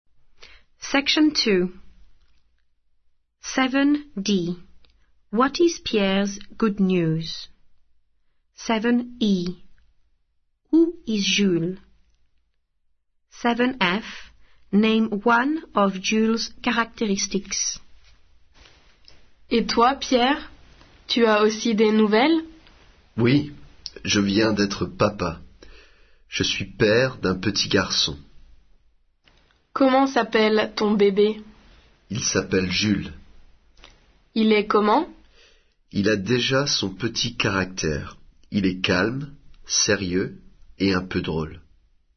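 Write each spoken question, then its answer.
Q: What is Pierre's good news?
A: he has just become a father (of a baby boy)

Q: Who is Jules?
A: Pierre's baby son

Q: Name one of Jules' characteristics.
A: calm / serious / a bit funny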